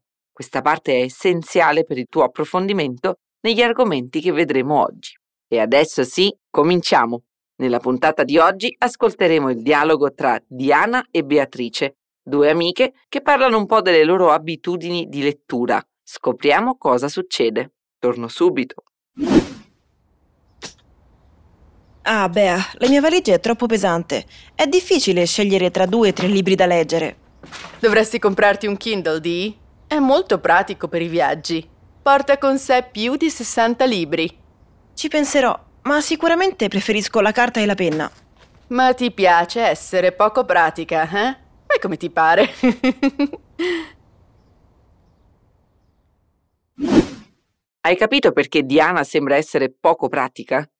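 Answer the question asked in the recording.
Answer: Perché preferisce i libri di carta (carta e penna) invece di comprare un Kindle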